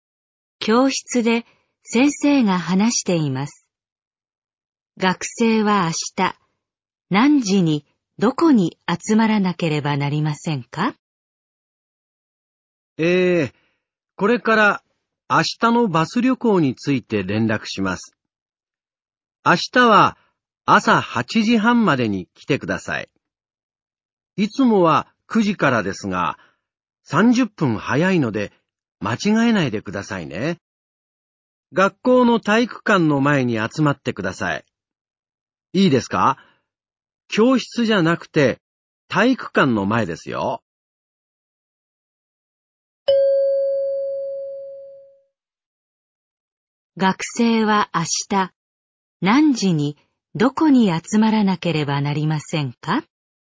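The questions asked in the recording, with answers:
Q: 学生は明日何時にどこに集まらなければなりませんか?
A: 8時半に体育館の前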